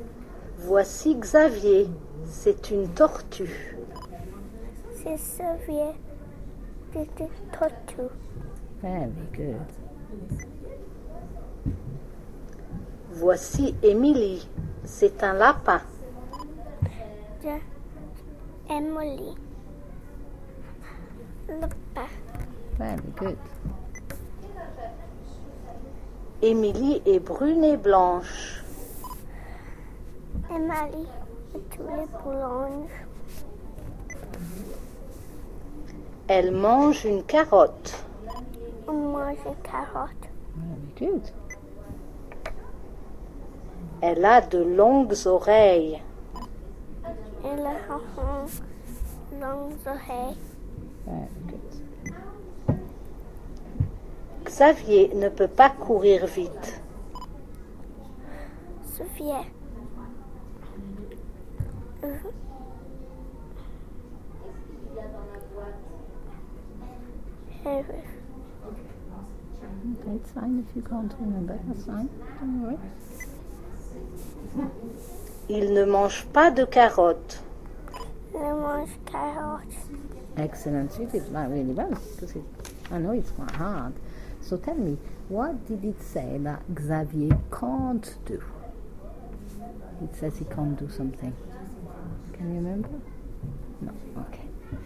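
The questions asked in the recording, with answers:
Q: So tell me, what did it say that Xavier can't do?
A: Run fast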